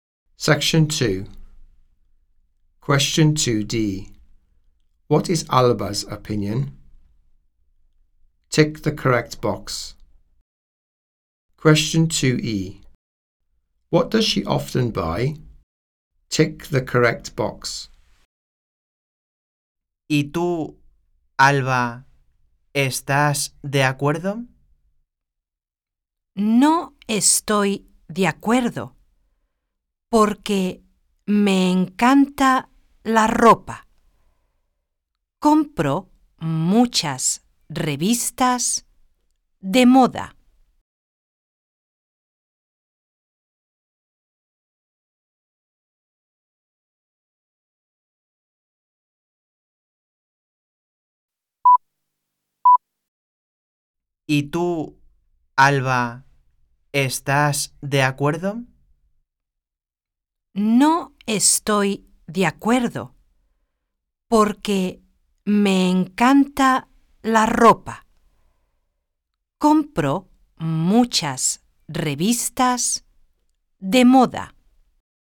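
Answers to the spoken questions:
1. She disagrees; she loves clothes
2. Fashion magazines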